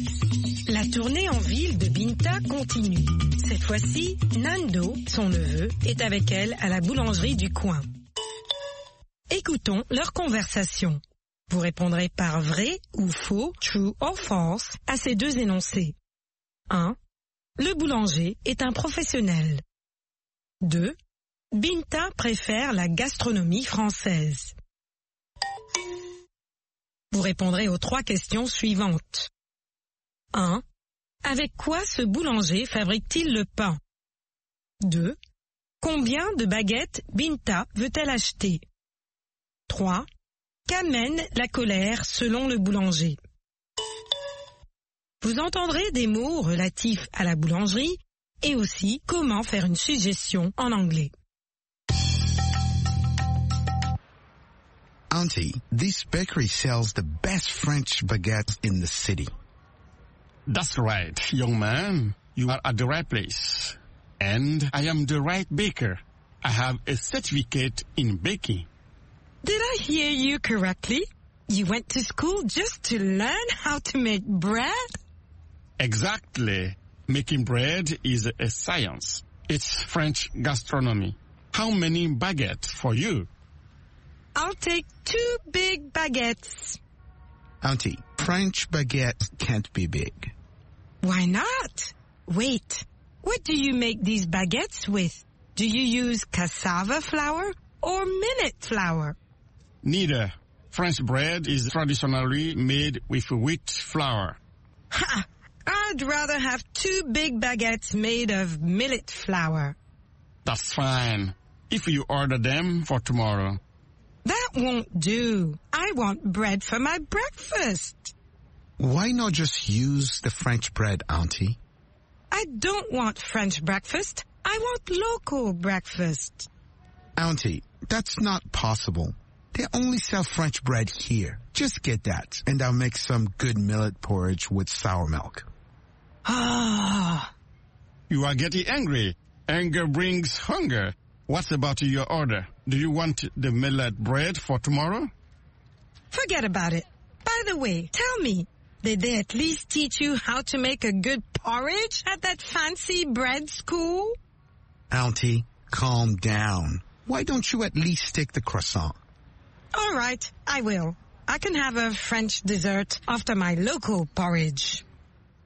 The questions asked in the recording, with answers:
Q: Le boulanger est un professionnel.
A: L'énoncé 1 est vrai. Le boulanger est un professionnel.

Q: Binta préfère la gastronomie française.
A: L'énoncé 2 est faux. Binta préfère la gastronomie française.

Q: Avec quoi ce boulanger fabrique-t-il le pain?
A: De la farine de blé.

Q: Combien de baguettes Binta veut-elle acheter?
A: 2 baguettes.

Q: Qu'amène la colère selon le boulanger?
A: La colère amène la faim.